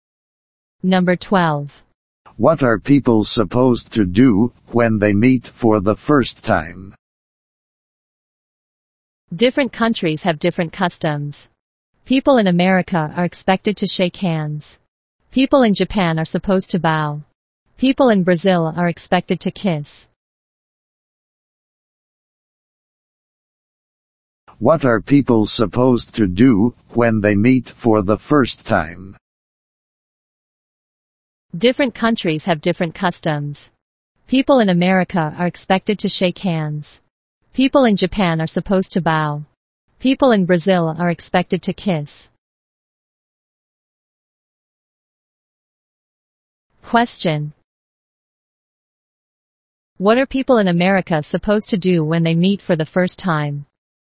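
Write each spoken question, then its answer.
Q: What are people in America supposed to do when they meet for the first time?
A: Shake hands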